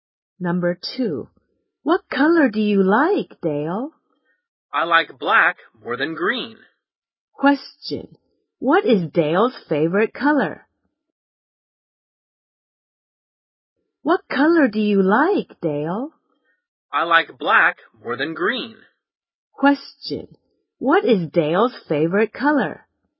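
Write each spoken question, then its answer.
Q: what is Dale's favorite color?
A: Black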